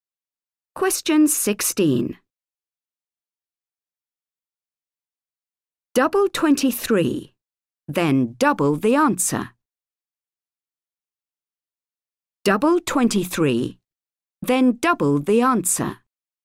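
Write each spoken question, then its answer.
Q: Double 23, then double the answer.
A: 92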